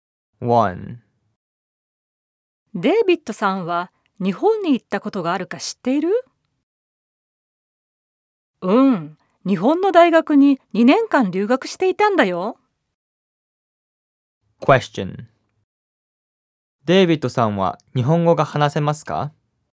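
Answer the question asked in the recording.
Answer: デイビッドさんは日本語が話せるはずです。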